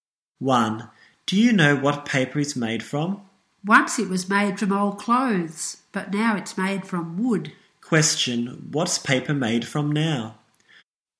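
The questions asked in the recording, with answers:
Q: Question, what's paper made from now?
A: Wood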